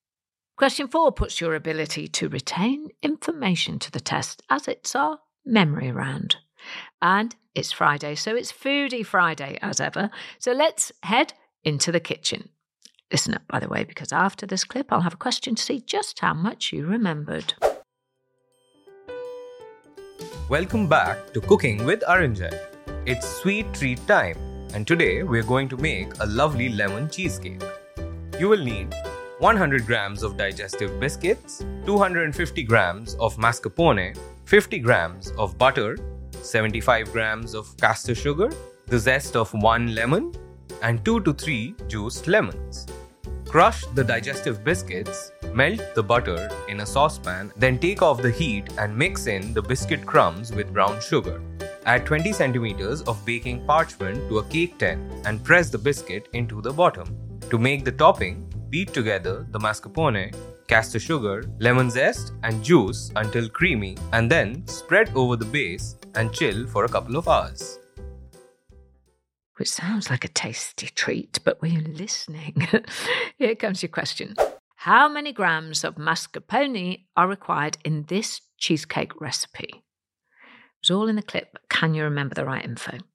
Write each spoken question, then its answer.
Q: How many grams of mascarpone are required in this cheesecake recipe?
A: And if you'd said the answer was 250 grams, I can award you one more point.